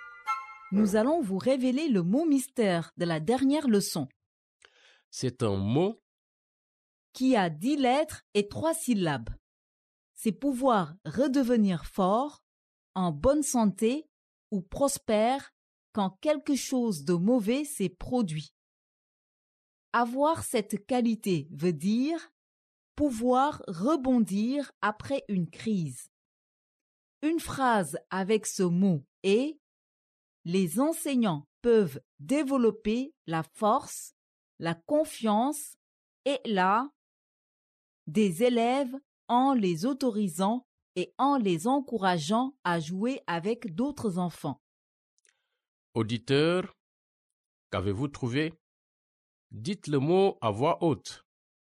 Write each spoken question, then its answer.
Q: Auditeur, qu'avez-vous trouvé?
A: Le mot mystère d'aujourd'hui est résilience.